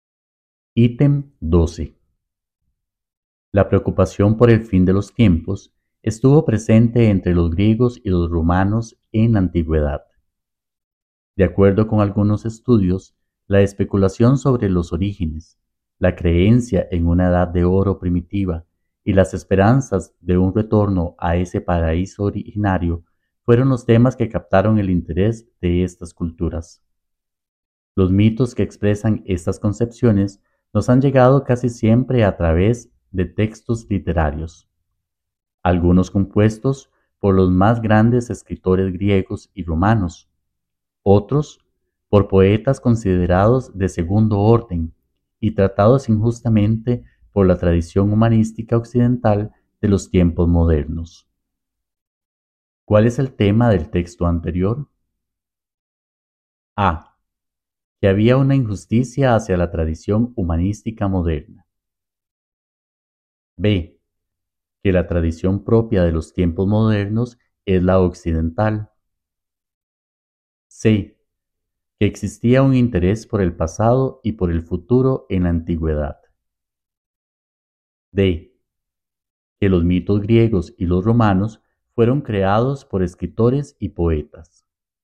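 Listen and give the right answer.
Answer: C: Que existía un interés por el pasado y por el futuro en la antigüedad.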